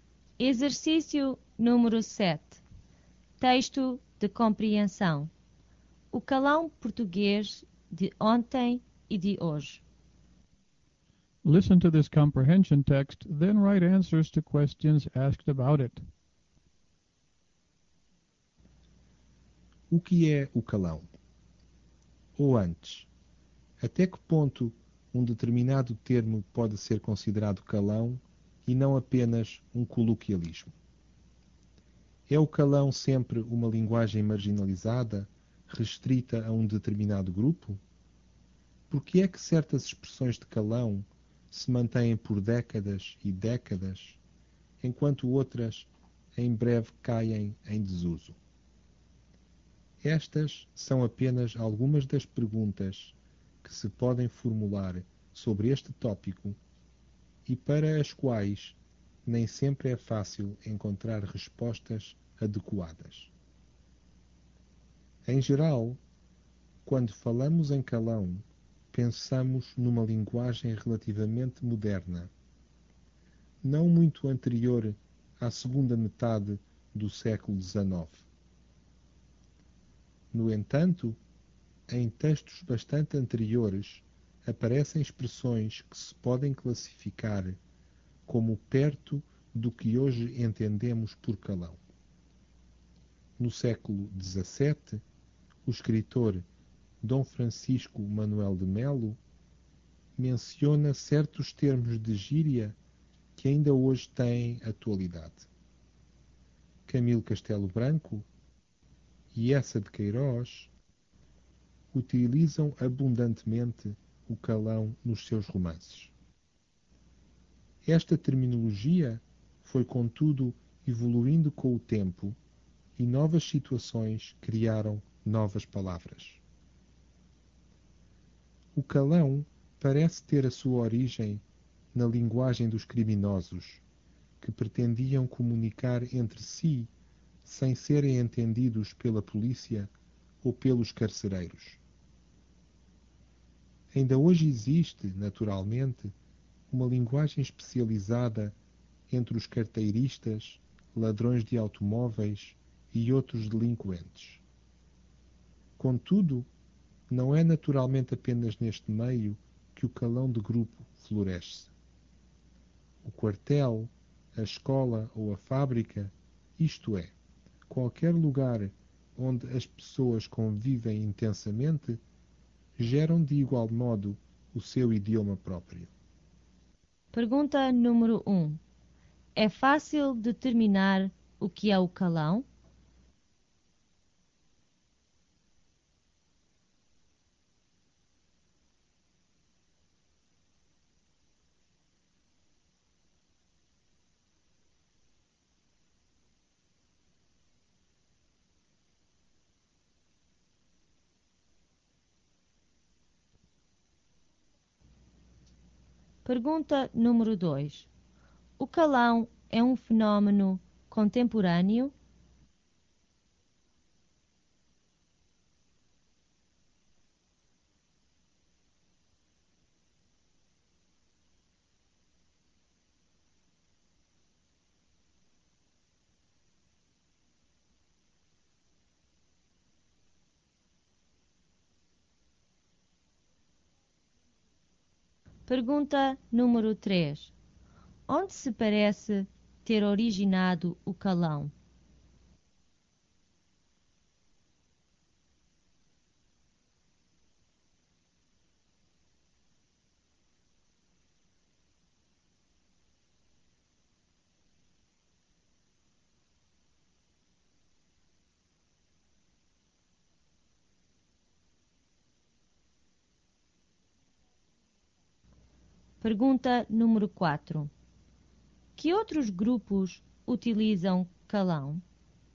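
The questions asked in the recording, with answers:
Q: É fácil determinar o que é o calão?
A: Não, nem sempre é fácil encontrar respostas adequadas.

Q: O calão é um fenómeno contemporâneo?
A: Não, já aparece em textos antigos, por exemplo no século XVII.

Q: Onde se parece ter originado o calão?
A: Na linguagem dos criminosos.

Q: Que outros grupos utilizam calão?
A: As pessoas do quartel, da escola ou da fábrica.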